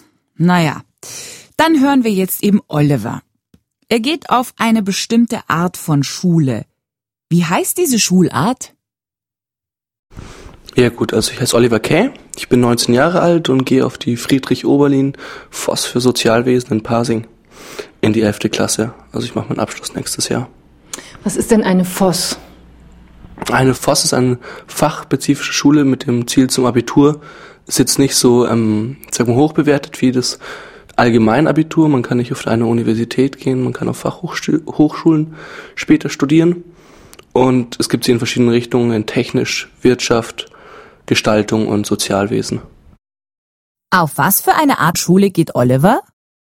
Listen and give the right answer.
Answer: Oliver geht auf eine FOSS, eine Fachoberschule.